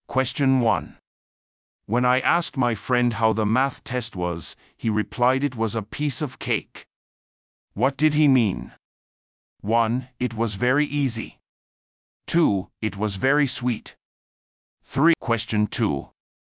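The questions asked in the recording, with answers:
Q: What did he mean?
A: 1: It was very easy.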